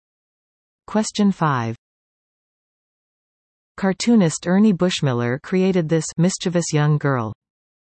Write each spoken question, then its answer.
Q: Cartoonist Ernie Bushmiller created this mischievous young girl.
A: The answer is Nancy.